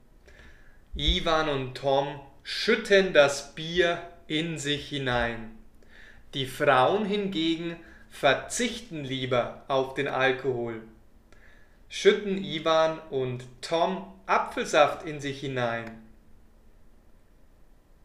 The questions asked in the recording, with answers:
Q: Schütten Ivan und Tom Apfelsaft in sich hinein.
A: Nein, sie schütten keinen Apfelsaft in sich hinein, sondern sie trinken Bier.